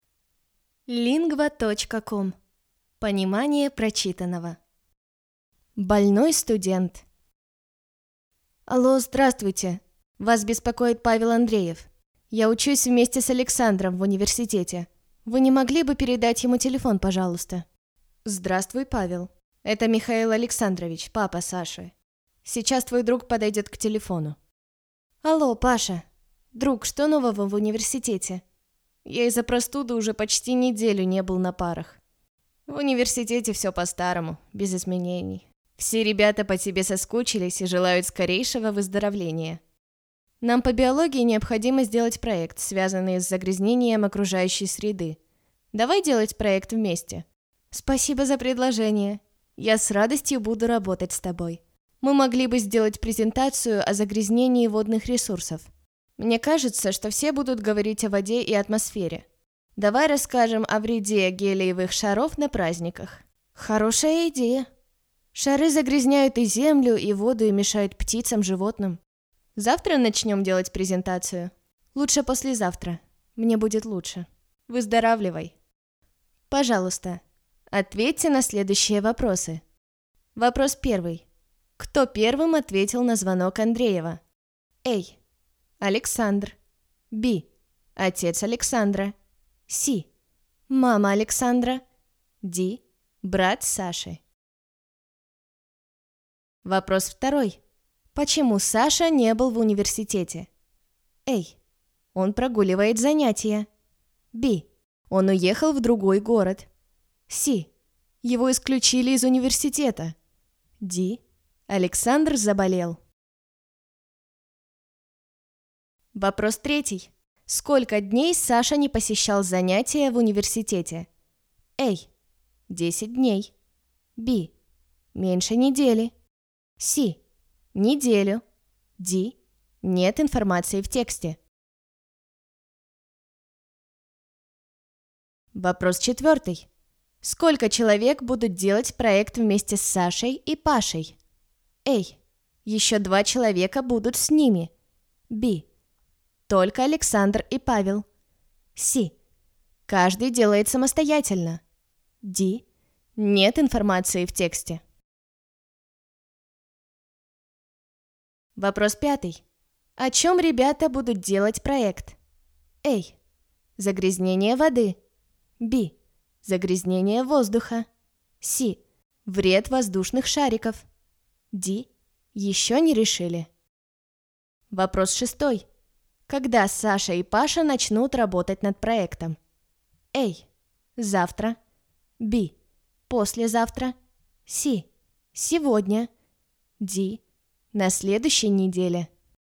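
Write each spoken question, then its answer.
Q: Кто первым ответил на звонок Андреева?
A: Б: Отец Александра

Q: Почему Саша не был в университете?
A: Д: Александр заболел

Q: Сколько дней Саша не посещал занятия в университете?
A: Б: Меньше недели

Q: Сколько человек будут делать проект вместе с Сашей и Пашей?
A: Б: Только Александр и Павел

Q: О чем ребята будут делать проект?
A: С: Вред воздушных шариков

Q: Когда Саша и Паша начнут работать над проектом?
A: Б: Послезавтра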